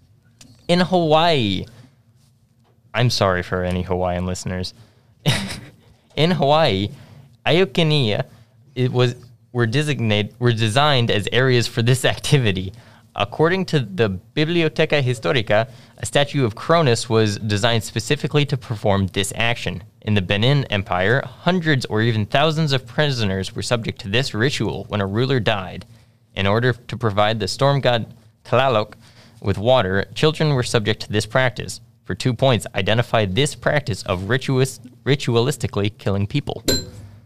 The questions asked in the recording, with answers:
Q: For 2 points, identify this practice of ritualistically killing people.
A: Human sacrifice is correct.